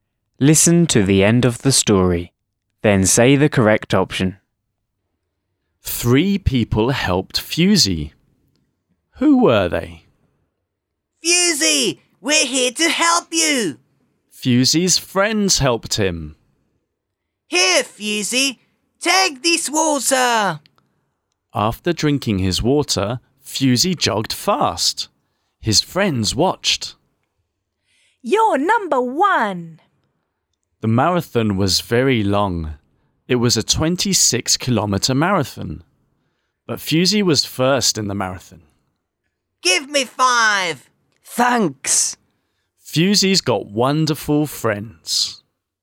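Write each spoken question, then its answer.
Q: Who were they?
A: Fusey's friends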